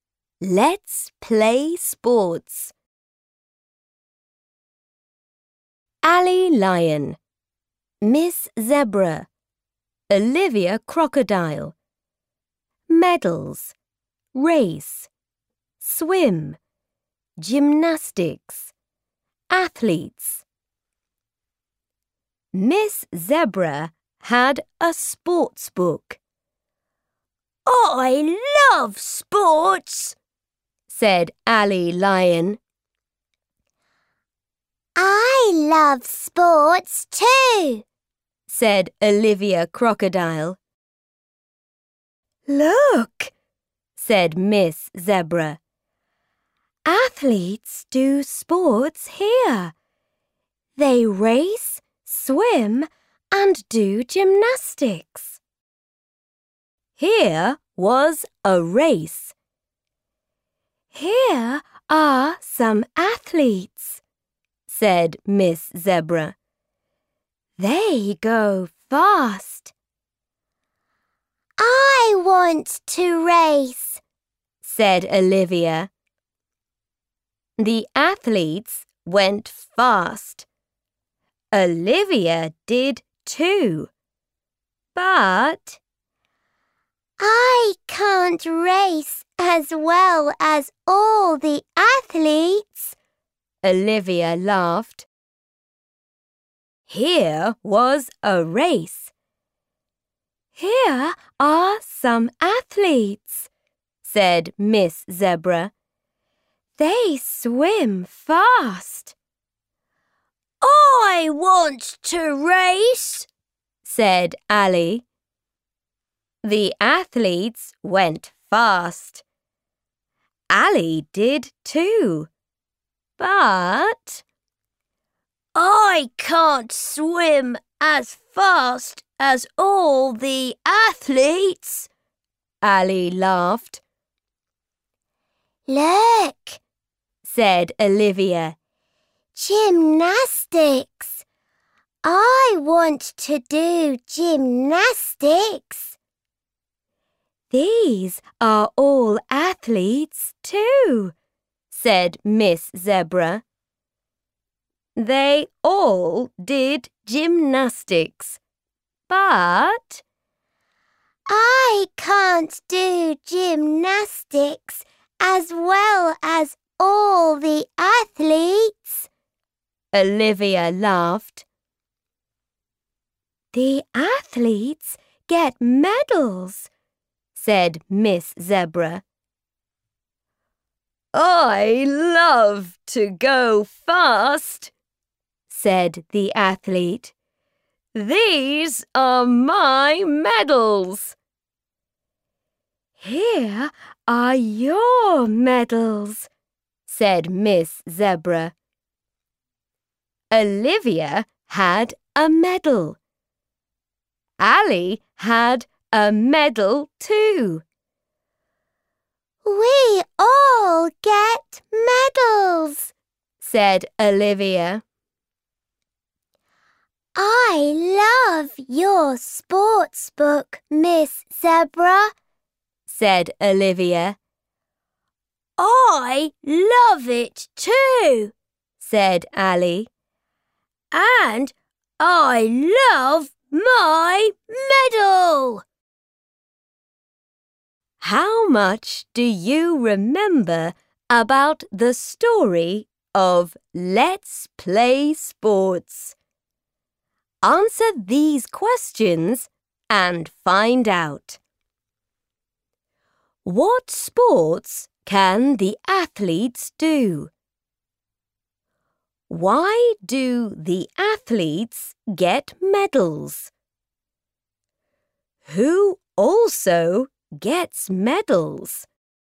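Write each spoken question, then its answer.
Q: What sports can the athletes do?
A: They race, swim and do gymnastics.

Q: Who also gets medals?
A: Olivia and Ally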